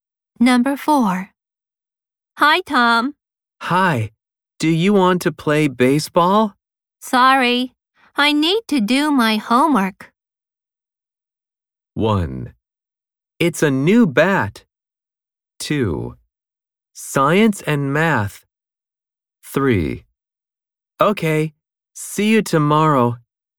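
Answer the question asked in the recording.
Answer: 3: Okay, see you tomorrow.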